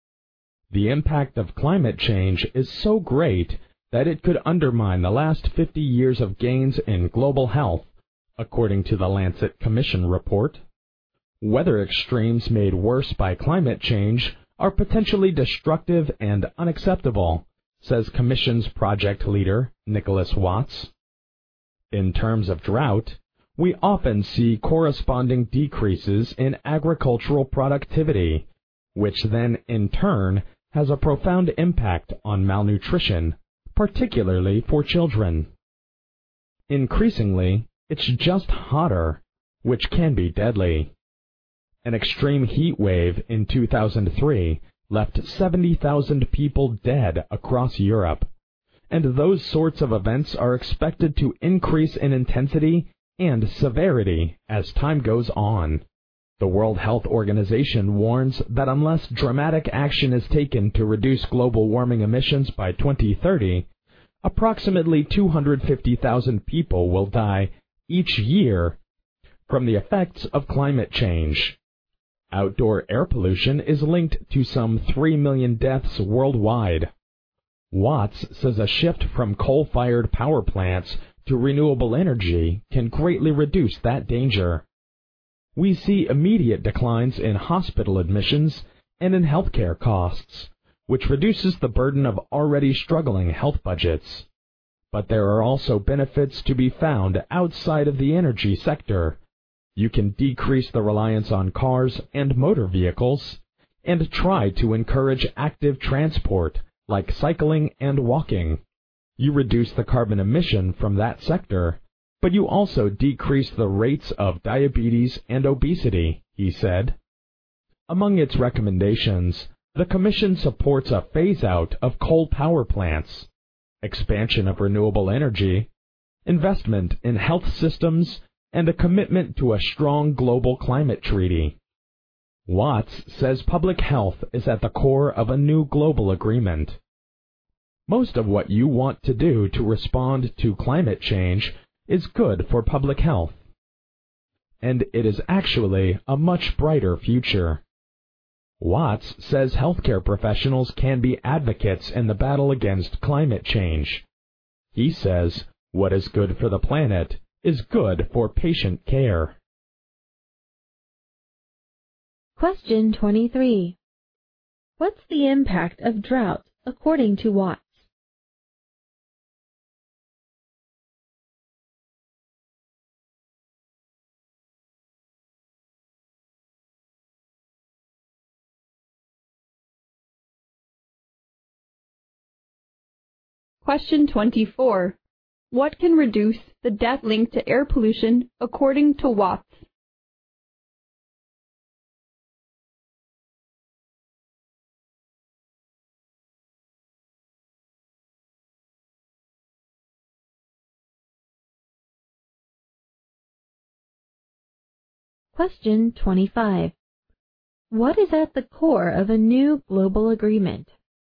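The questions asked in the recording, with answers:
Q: What's the impact of drought, according to Watts?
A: Decreases in agricultural productivity, leading to malnutrition, particularly for children

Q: What can reduce the death link to air pollution, according to Watts?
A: A shift from coal-fired power plants to renewable energy

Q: What is at the core of a new global agreement?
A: Public health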